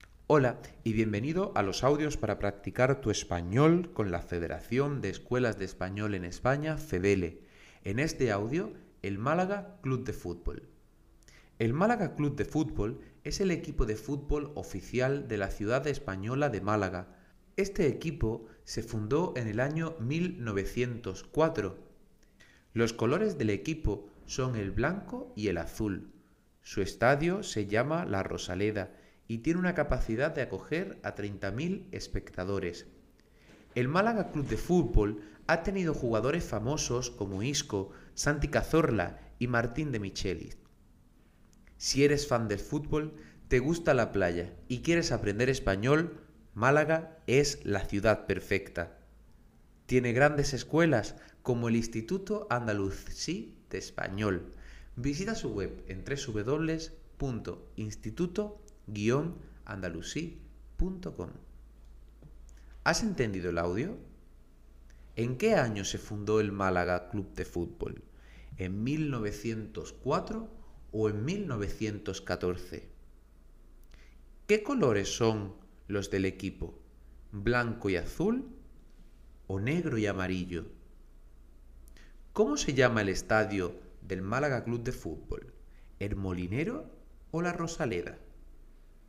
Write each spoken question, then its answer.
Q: ¿En qué año se fundó el Málaga Club de Fútbol?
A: 1904

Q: ¿Qué colores son los del equipo?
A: Blanco y Azul

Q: ¿Cómo se llama el estadio del Málaga Club de Fútbol?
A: La Rosaleda